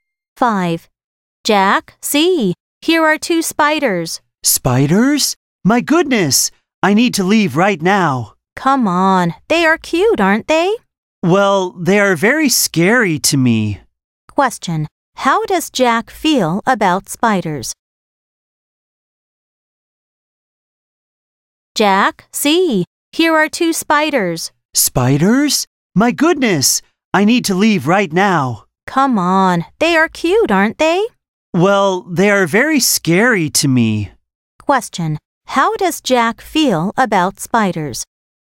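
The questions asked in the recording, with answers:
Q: How does Jack feel about spiders?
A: Scared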